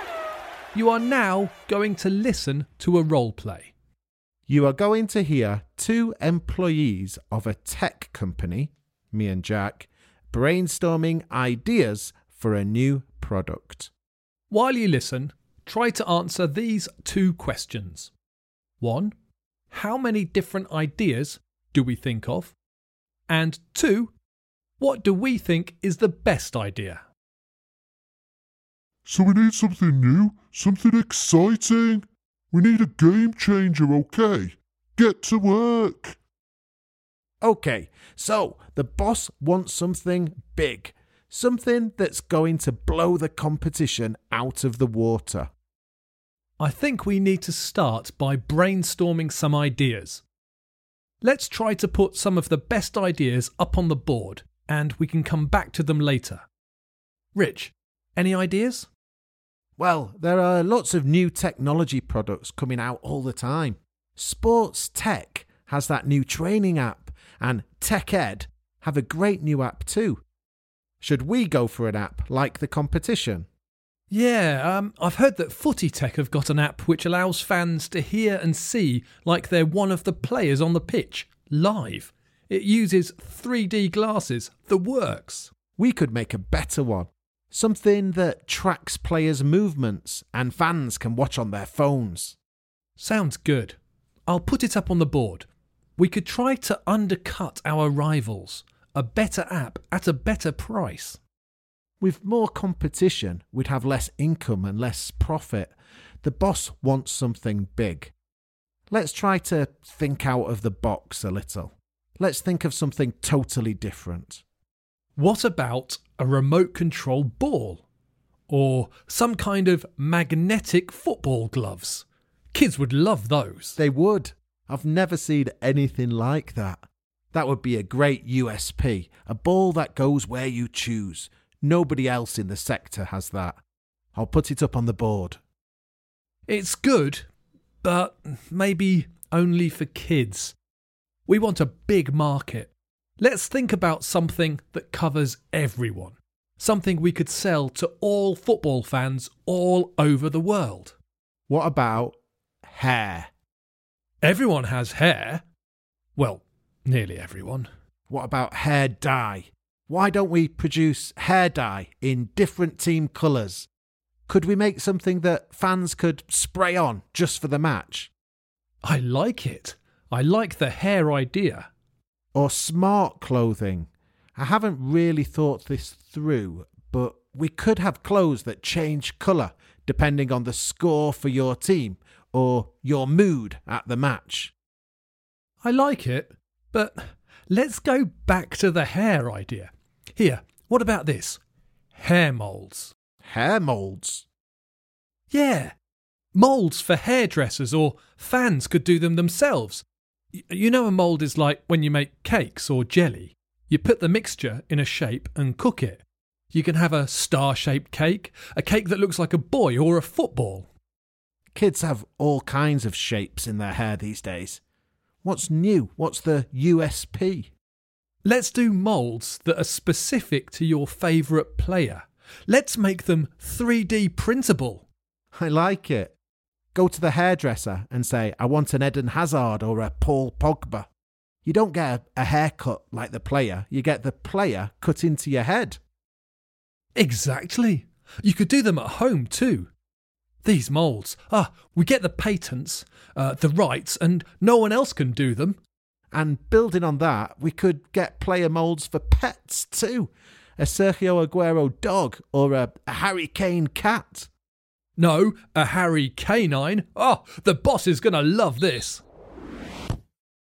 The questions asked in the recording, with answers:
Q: what do we think is the best idea?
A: The answer, of course, is the hair mould idea.